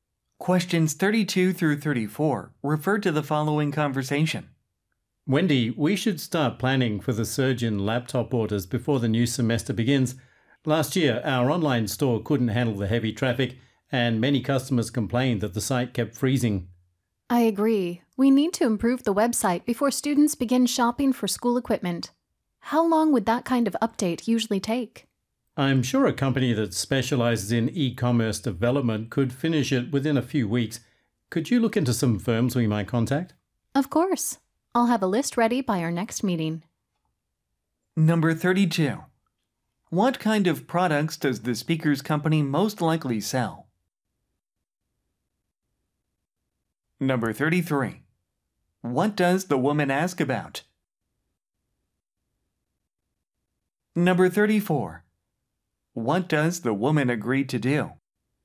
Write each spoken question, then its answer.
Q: What kind of products does the speaker's company most likely sell?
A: 그러면은 휴대용 컴퓨터를 파는군요. 그러면은 32번 정답은 B번, laptop computers.

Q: What does the woman ask about?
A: 그래서 B번, How much time the update will require?

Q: What does the woman agree to do?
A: 그렇기 때문에 34번 정답은 B, Research some possible vendors.